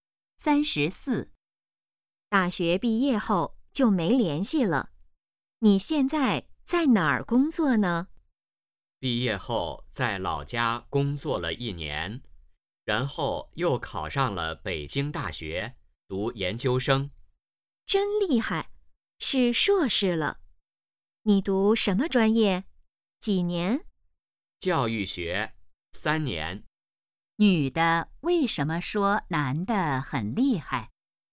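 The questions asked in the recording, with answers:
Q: 女的为什么说男的很厉害?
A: 男的考上了北京大学的研究生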